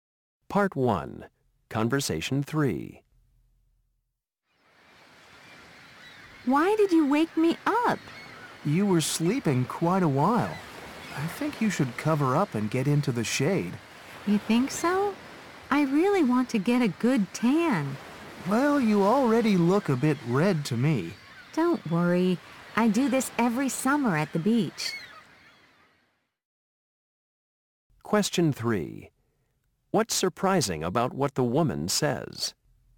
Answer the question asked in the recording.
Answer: You shouldn't lie in the sun so long without protection.